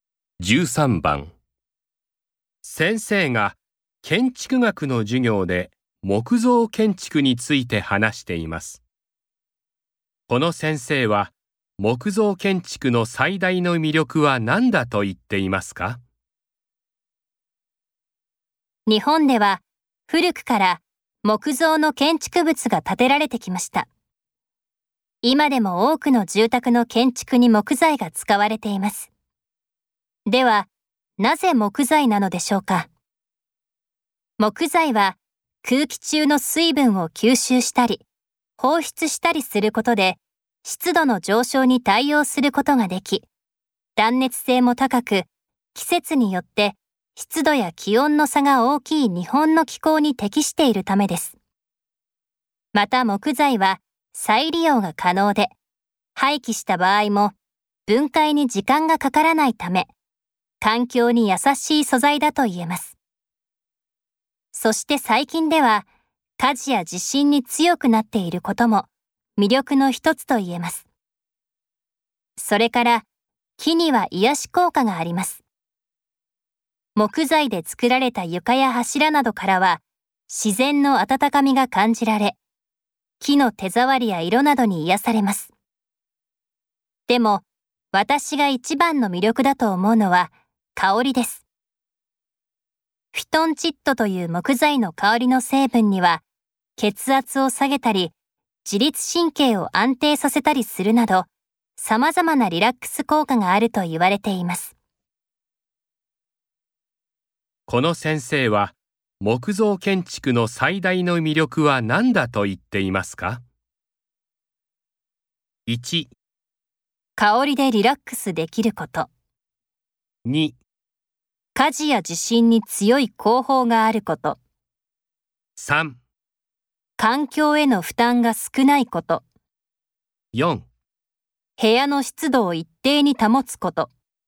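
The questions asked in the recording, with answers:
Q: この先生は、木造建築の最大の魅力は何だと言っていますか?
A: 1: 香りでリラックスできること。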